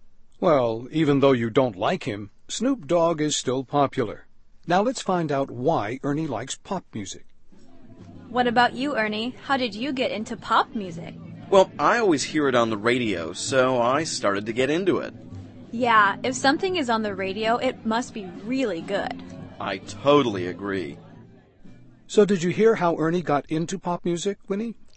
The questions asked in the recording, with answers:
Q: So did you hear how Ernie got into pop music, Winnie?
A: 他呀,是因为老听广播里播的流行歌曲,所以呢,就喜欢上了。